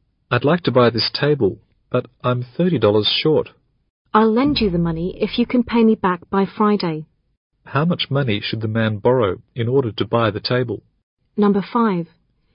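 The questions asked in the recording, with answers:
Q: How much money should the man borrow in order to buy the table?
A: $30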